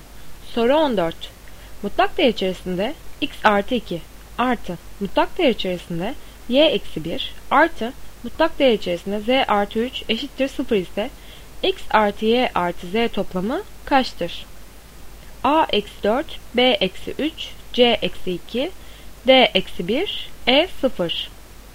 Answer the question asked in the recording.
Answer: Doğru cevap A eksi 4.